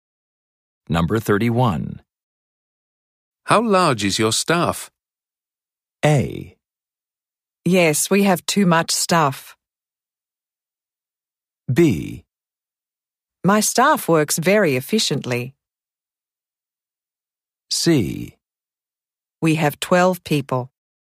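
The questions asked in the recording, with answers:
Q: How large is your staff?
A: C: We have 12 people.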